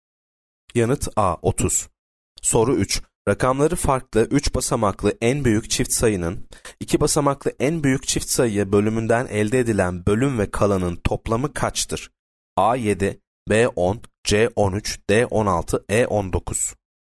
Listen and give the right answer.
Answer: Yanıt D 16.